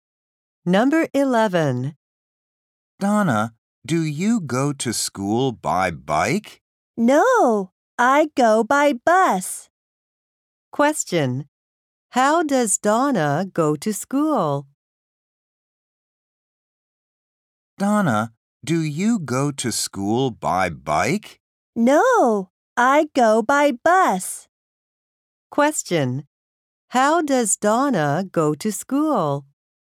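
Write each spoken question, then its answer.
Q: How does Donna go to school?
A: By bus.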